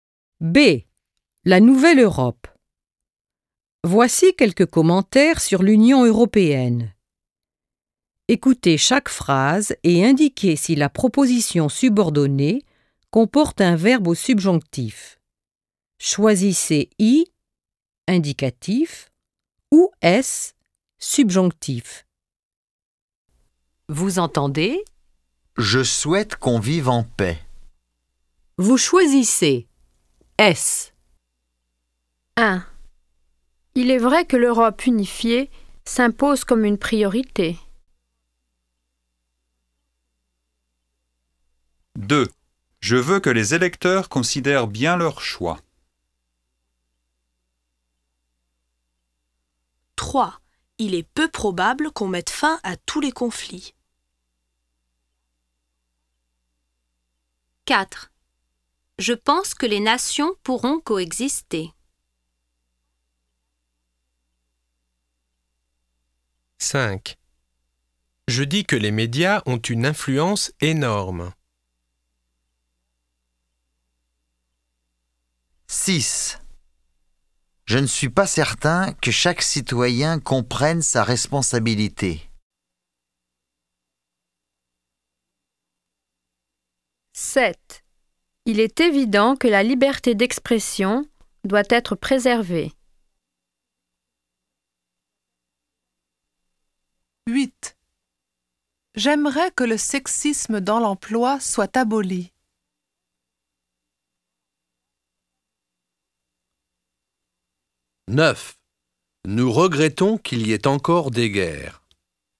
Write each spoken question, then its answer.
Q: Il est vrai que l'Europe unifiée s'impose comme une priorité.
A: 1. I.

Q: Je veux que les électeurs considèrent bien leur choix.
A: 2. S.

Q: Il est peu probable qu'on mette fin à tous les conflits.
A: 3. S.

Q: Je pense que les nations pourront coexister.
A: 4. I.

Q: Je dis que les médias ont une influence énorme.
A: 5. I.

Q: Je ne suis pas certain que chaque citoyen comprenne sa responsabilité.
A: 6. S.

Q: Il est évident que la liberté d'expression doit être préservée.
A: 7. I.

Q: J'aimerais que le sexisme dans l'emploi soit aboli.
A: 8. S.

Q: Nous regrettons qu'il y ait encore des guerres.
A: 9. S.